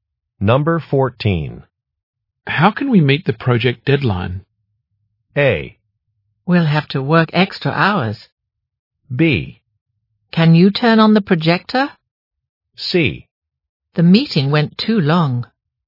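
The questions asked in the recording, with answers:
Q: How can we meet the project deadline?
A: A: We'll have to work extra hours.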